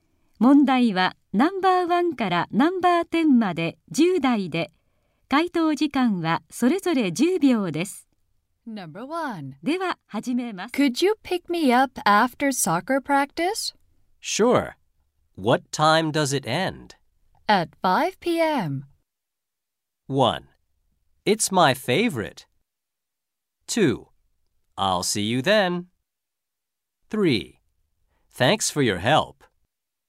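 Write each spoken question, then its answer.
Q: At 5 p.m.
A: 2: I'll see you then.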